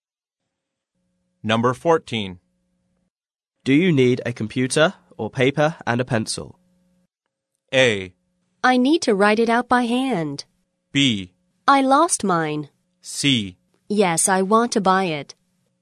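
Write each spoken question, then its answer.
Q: Do you need a computer or paper and a pencil?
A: A: I need to write it out by hand.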